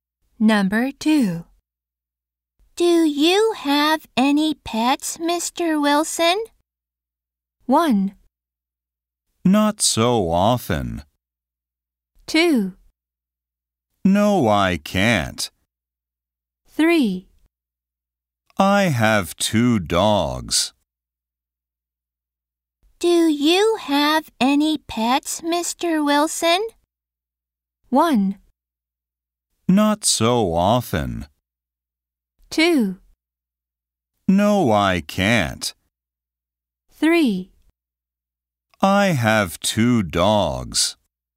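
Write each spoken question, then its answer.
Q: Do you have any pets, Mr. Wilson?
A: 3: I have 2 dogs.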